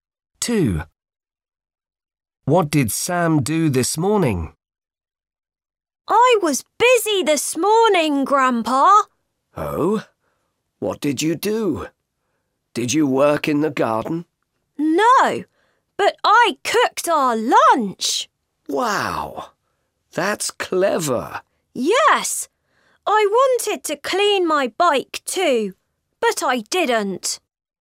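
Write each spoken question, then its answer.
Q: What did Sam do this morning?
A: He cooked lunch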